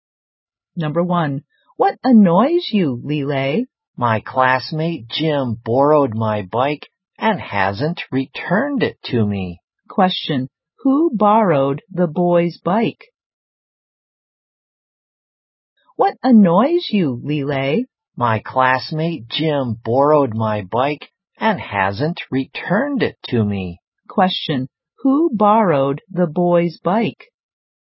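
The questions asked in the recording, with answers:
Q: who borrowed the boy's bike?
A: Jim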